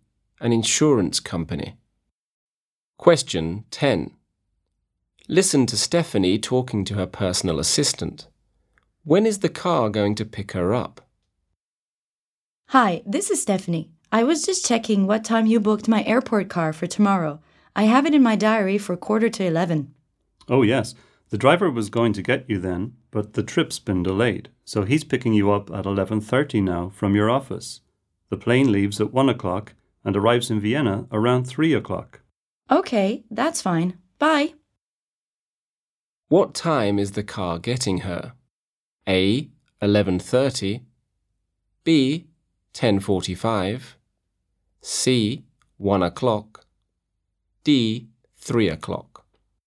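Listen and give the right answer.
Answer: A: 11:30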